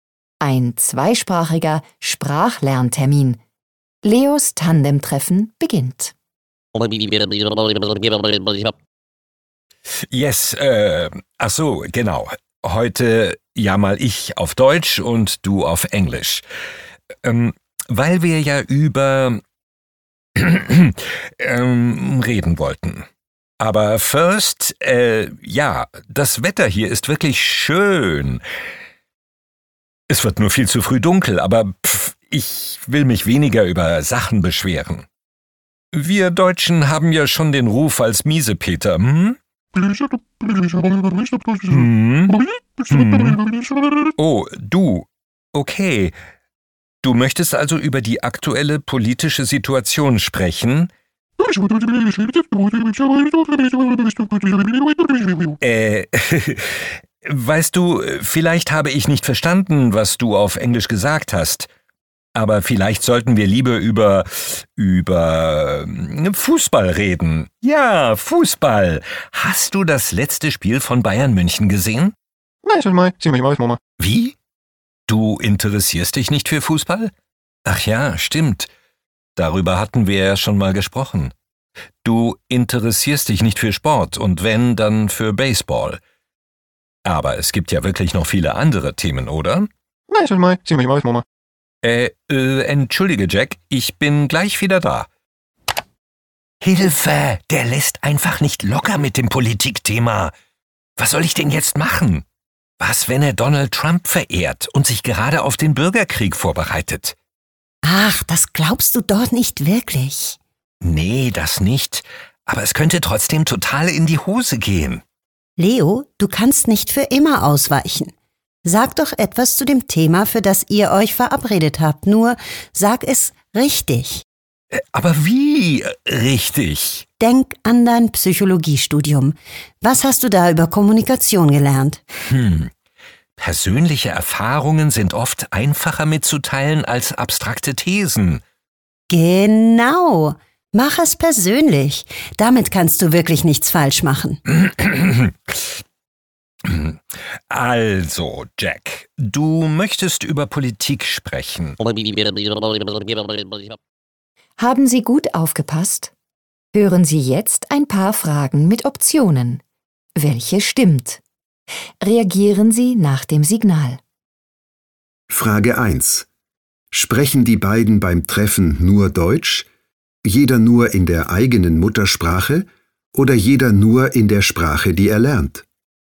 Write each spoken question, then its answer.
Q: Sprechen die beiden beim Treffen nur Deutsch?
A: Jeder spricht in der eigenen Muttersprache und hört die Sprache, die er lernt.